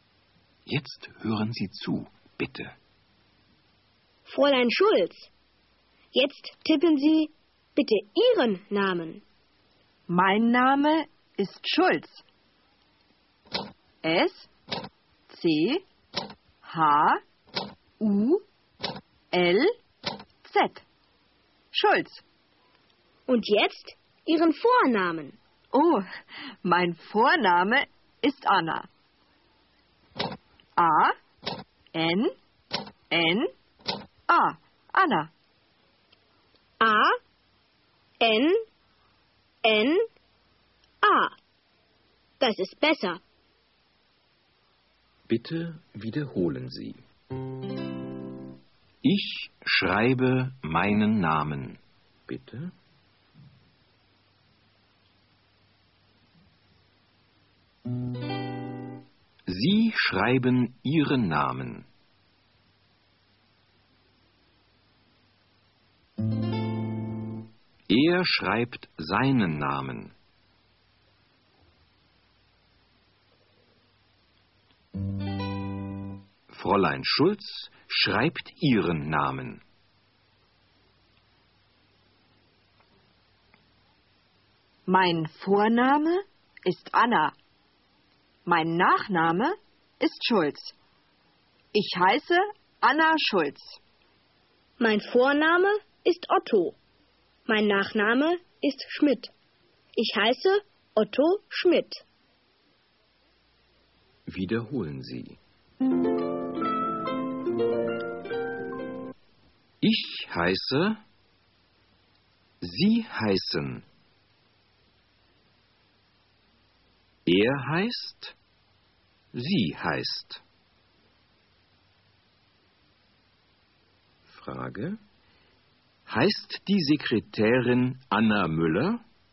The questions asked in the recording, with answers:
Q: Heißt die Sekretärin Anna Müller?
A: Nein, sie heißt nicht Anna Müller.